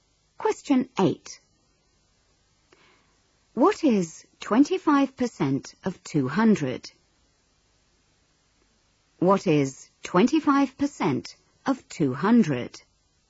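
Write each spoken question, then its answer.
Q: What is 25% of 200?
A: 50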